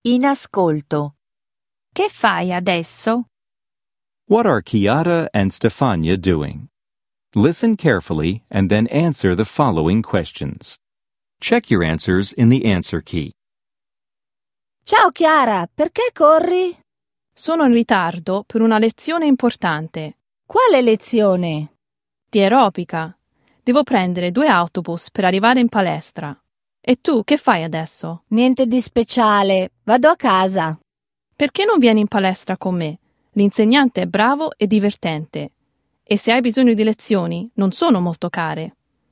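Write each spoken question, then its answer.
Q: What are Chiara and Stefania doing?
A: Chiara is hurrying to an aerobics class at the gym; Stefania is going home.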